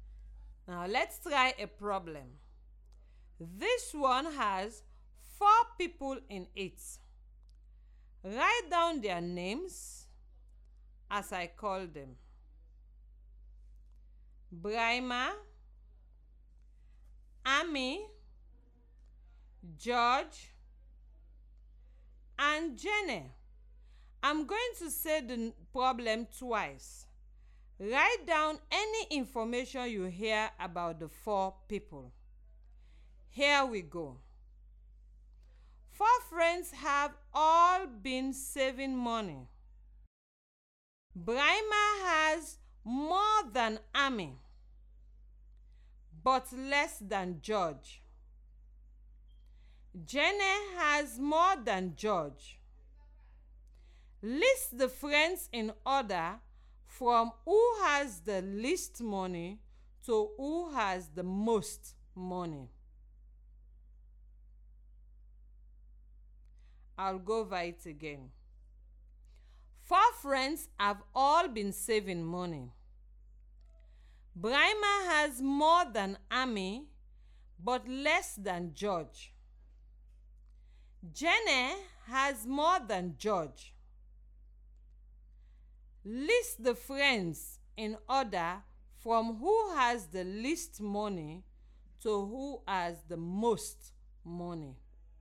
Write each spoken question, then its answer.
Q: List the friends in order from who has the least money to who has the most money.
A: I know that Amy has the least money, followed by Brahma, then George, then Jenny has the most money.